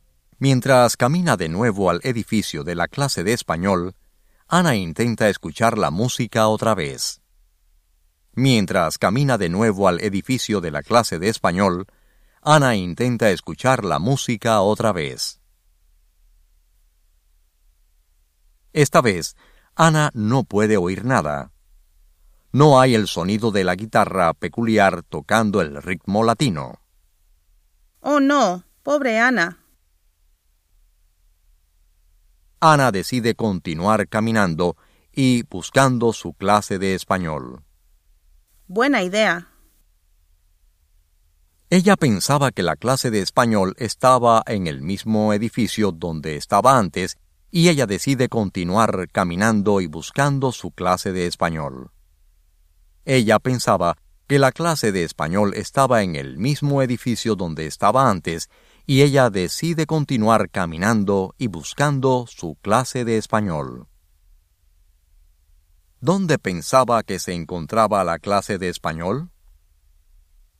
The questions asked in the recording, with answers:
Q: ¿Dónde pensaba que se encontraba la clase de español?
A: Ella pensaba que la clase de español se encontraba en el mismo edificio donde estaba antes.